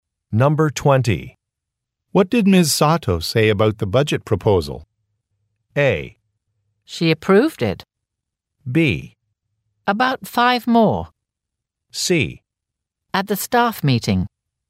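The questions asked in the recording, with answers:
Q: What did Ms. Sato say about the budget proposal?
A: A: She approved it.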